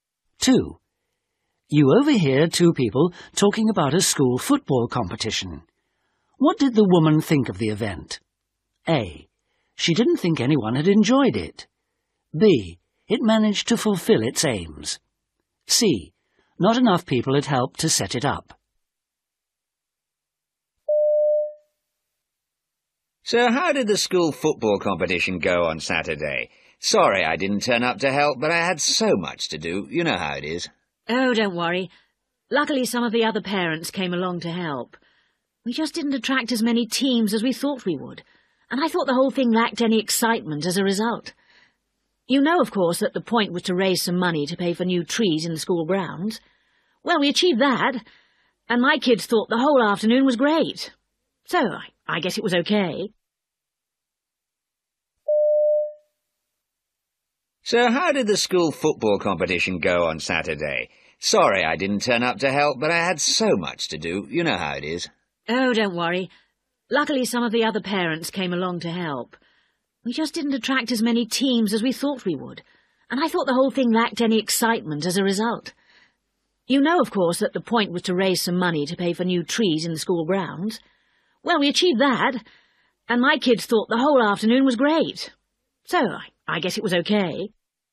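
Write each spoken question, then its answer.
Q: What did the woman think of the event?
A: B: It managed to fulfill its aims.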